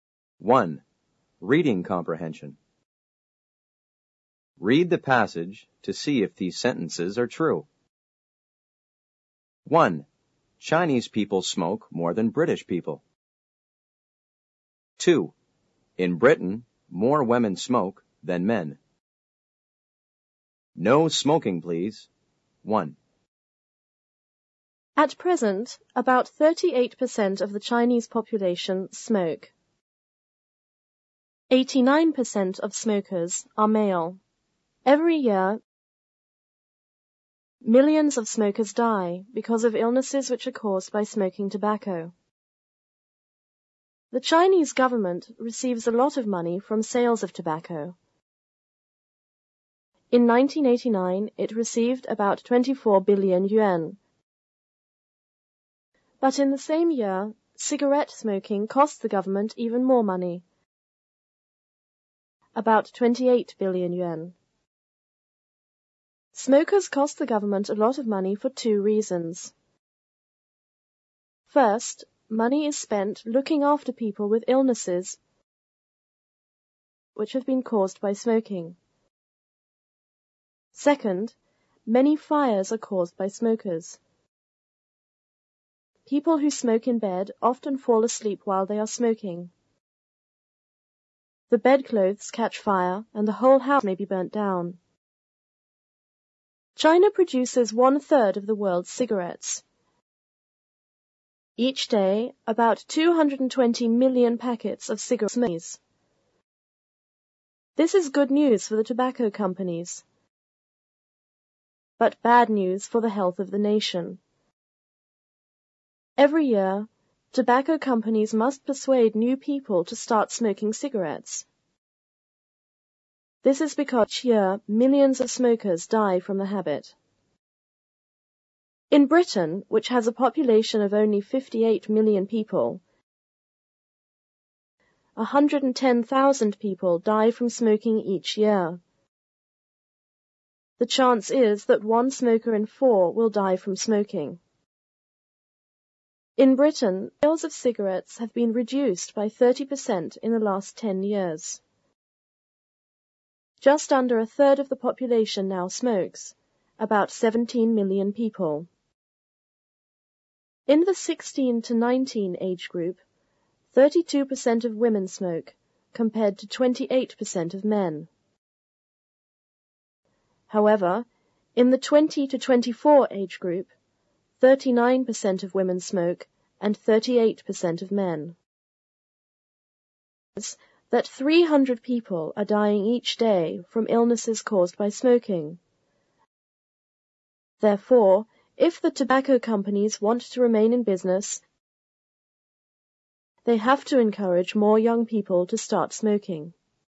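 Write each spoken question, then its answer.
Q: Chinese people smoke more than British people.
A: True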